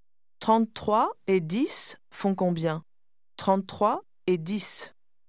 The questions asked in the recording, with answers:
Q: 33 et 10 font combien ? 33 et 10.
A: 43.